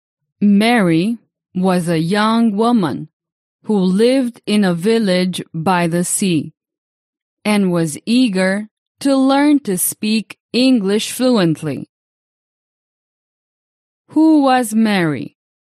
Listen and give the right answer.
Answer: Mary was a young woman eager to learn English.